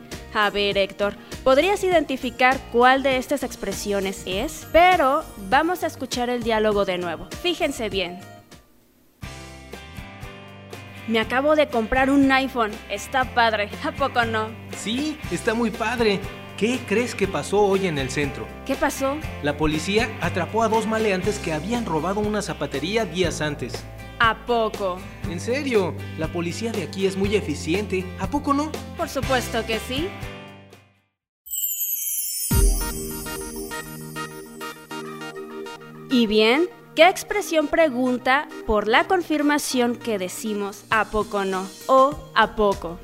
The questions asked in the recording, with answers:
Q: ¿Qué expresión pregunta por la confirmación que decimos a poco no o a poco?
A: ¿A poco no?